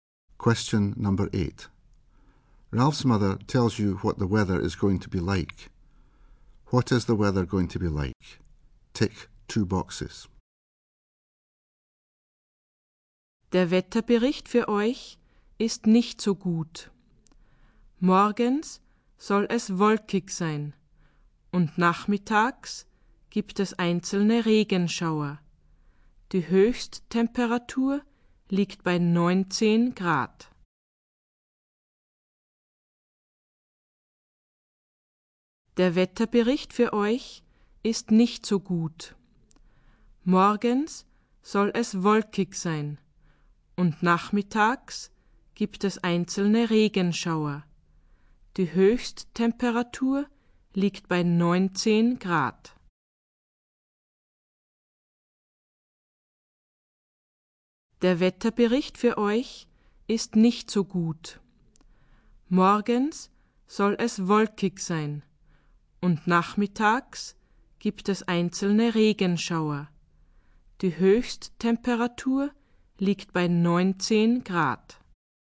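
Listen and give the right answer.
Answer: Cloudy in the morning, showers in the afternoon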